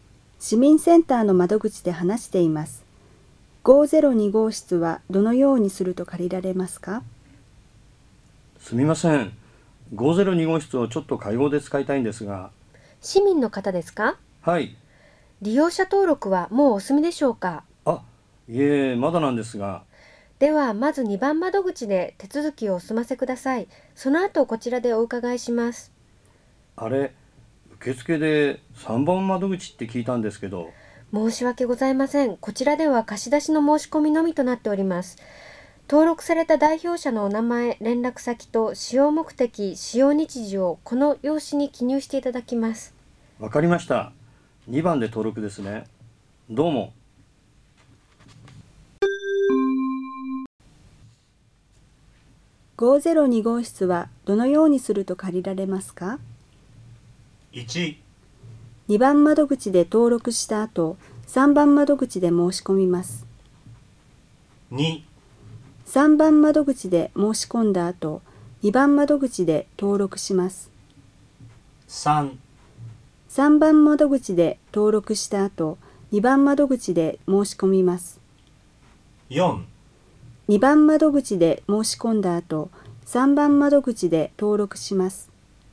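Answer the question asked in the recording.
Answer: 1: 2番窓口で登録した後、3番窓口で申し込みます。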